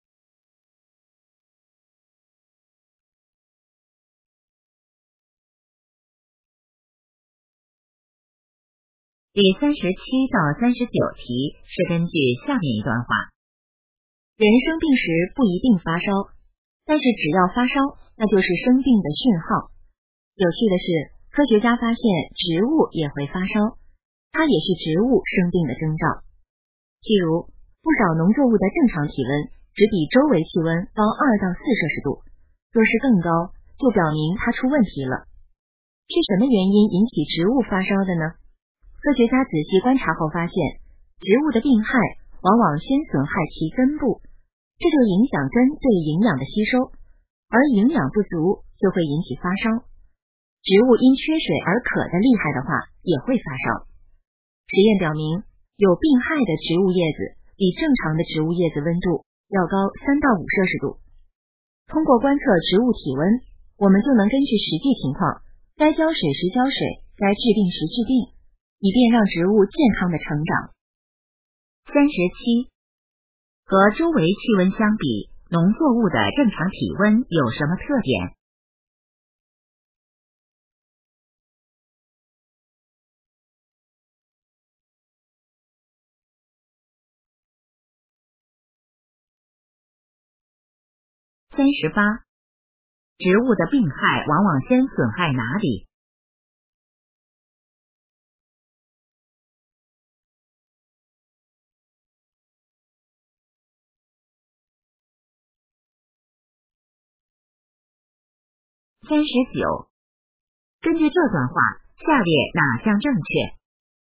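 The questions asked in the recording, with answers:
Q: 和周围气温相比,农作物的正常体温有什么特点?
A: 高2-4摄氏度

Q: 植物的病害往往先损害哪里?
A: 根部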